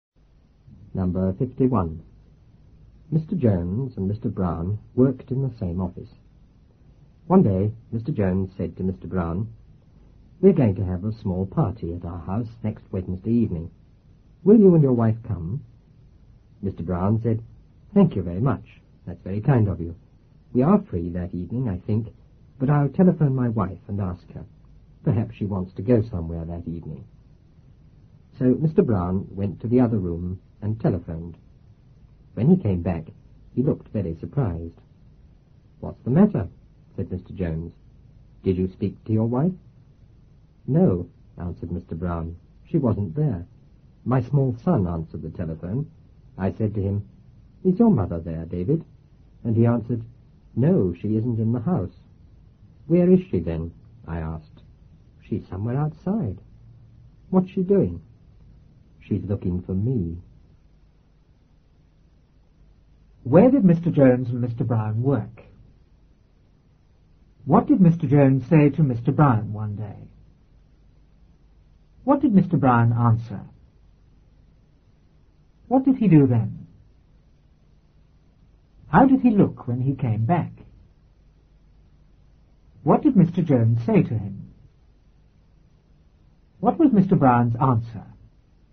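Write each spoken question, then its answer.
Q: Where did Mr. Jones and Mr. Brown work?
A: In the same office

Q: What did Mr. Jones say to Mr. Brown one day?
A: He invited him and his wife to a small party at his house next Wednesday evening

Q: What did Mr. Brown answer?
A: Thank you, he thought they were free but would telephone his wife and ask her

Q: What did he do then?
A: He went to the other room and telephoned

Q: How did he look when he came back?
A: Very surprised

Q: What did Mr. Jones say to him?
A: What's the matter? Did you speak to your wife?

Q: What was Mr. Brown's answer?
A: No, she wasn't there; his small son answered and said she was outside looking for him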